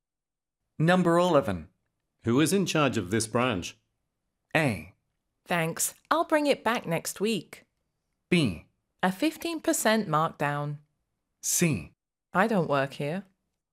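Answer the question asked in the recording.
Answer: C: I don't work here.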